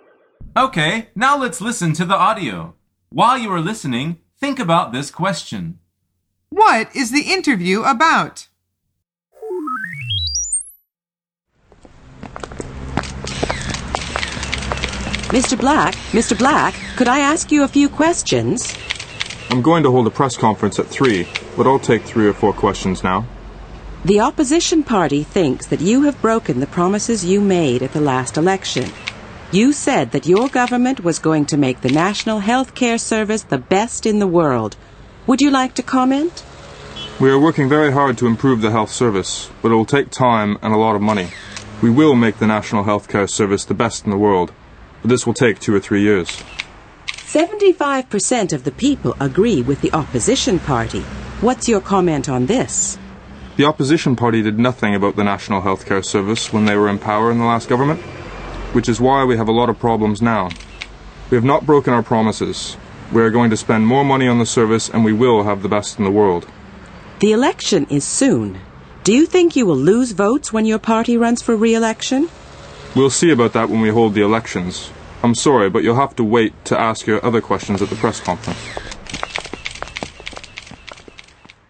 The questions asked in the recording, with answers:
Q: What is the interview about?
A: The answer is the National Health Care Service.